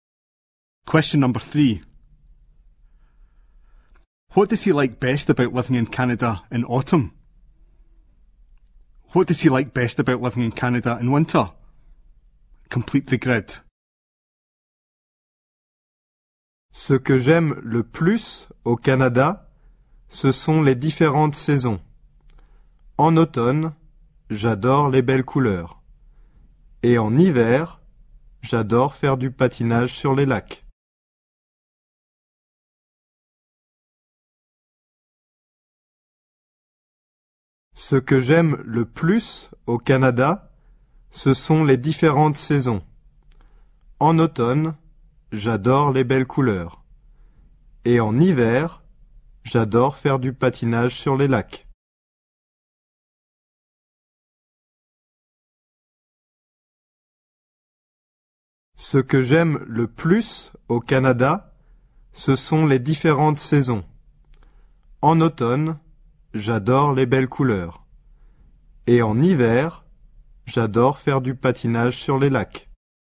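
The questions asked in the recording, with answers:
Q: What does he like best about living in Canada in autumn?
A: The beautiful colours

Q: What does he like best about living in Canada in winter?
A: Skating on the lakes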